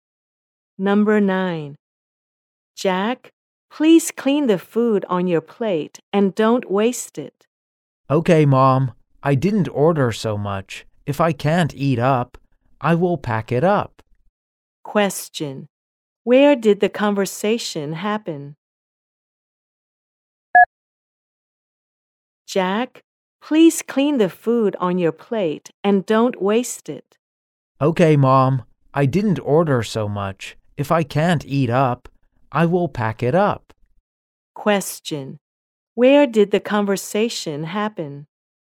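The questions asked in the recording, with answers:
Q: Where did the conversation happen?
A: In a restaurant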